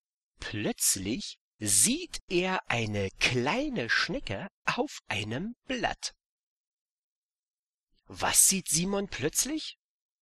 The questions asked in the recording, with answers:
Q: Was sieht Simon plötzlich?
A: Eine kleine Schnecke. Er sieht eine kleine Schnecke auf einem Blatt.